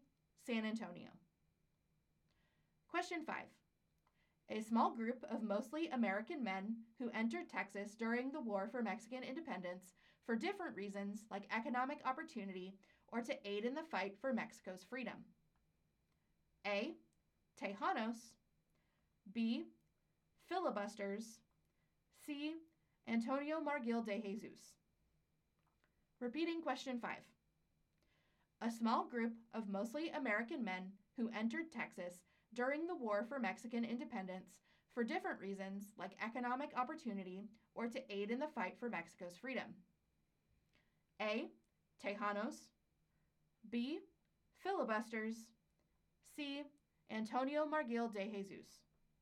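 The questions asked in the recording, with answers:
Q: A small group of mostly American men who entered Texas during the War for Mexican Independence for different reasons like economic opportunity or to aid in the fight for Mexico's freedom.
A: B: Filibusters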